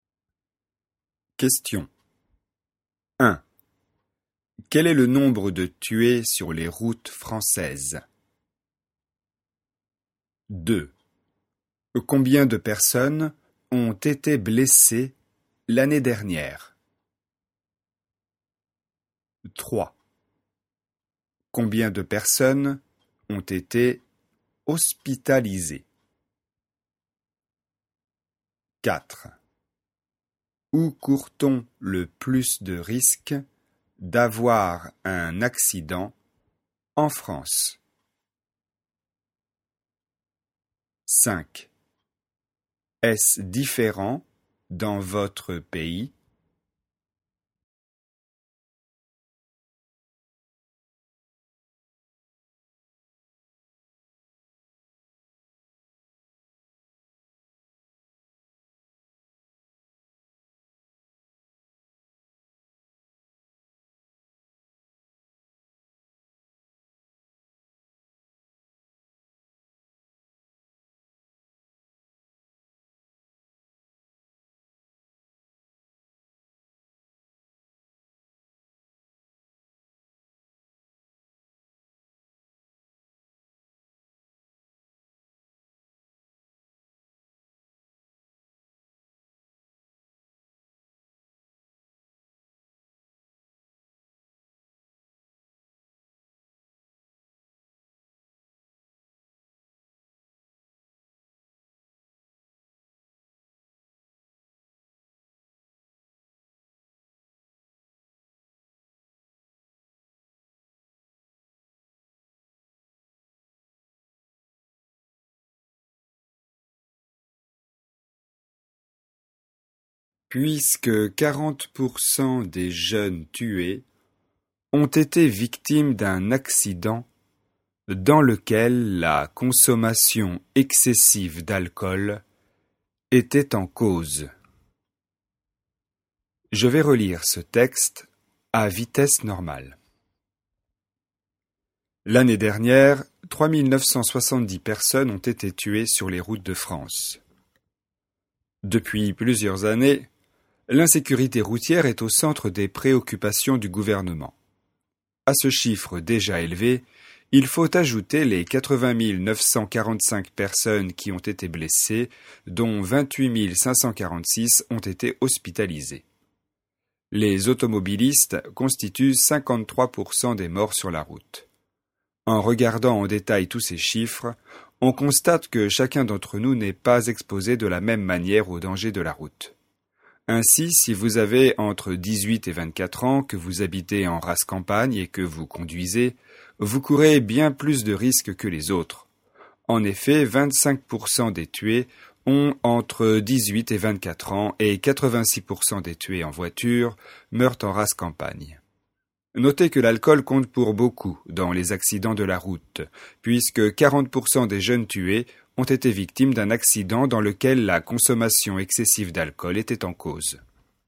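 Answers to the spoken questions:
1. 3970 personnes (l'année dernière)
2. 80 945 personnes
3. 28 546 personnes
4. En rase campagne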